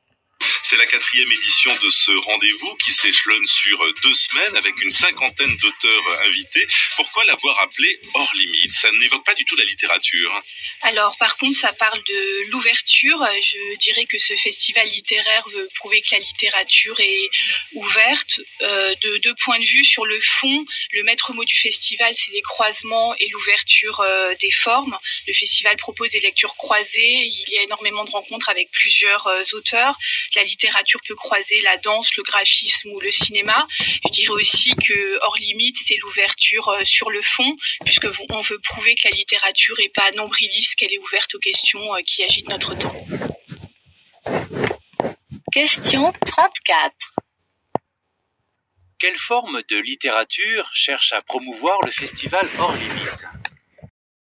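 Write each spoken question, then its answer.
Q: Quelle forme de littérature cherche à promouvoir le festival Hors Limite ?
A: Une littérature ouverte, qui croise d'autres formes d'art (danse, graphisme, cinéma) et s'ouvre aux questions de notre temps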